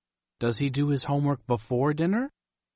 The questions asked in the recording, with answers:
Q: Does he do his homework before dinner?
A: No, he doesn't. He does his homework after dinner.